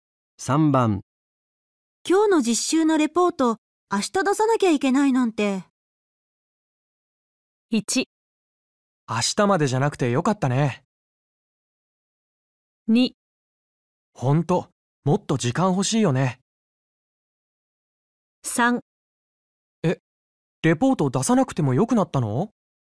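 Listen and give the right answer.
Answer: 2: ほんともっと時間欲しいよね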